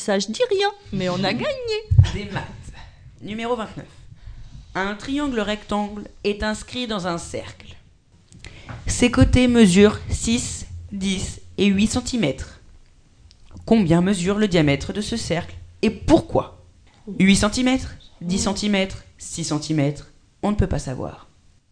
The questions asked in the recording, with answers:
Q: Combien mesure le diamètre de ce cercle et pourquoi ?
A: Je dirais 10 cm.